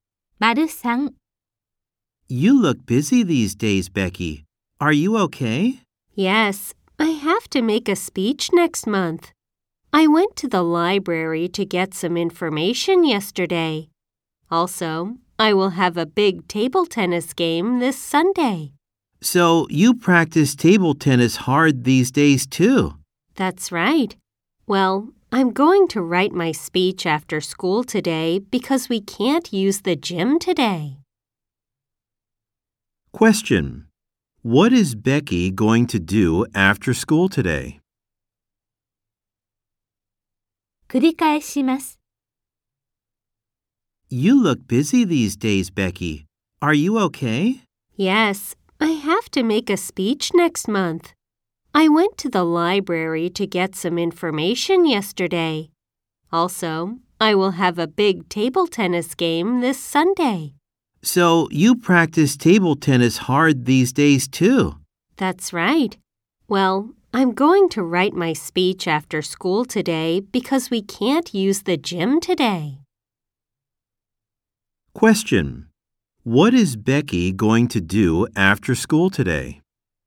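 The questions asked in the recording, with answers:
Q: What is Becky going to do after school today?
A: Write her speech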